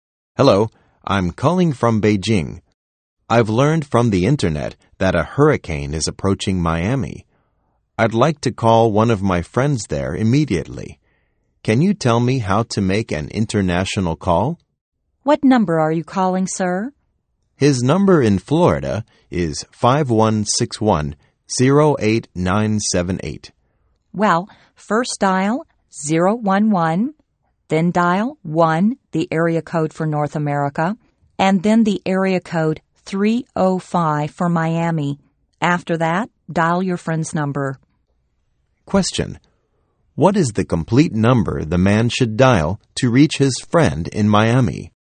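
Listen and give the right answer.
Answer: 011-1-305-5161-08978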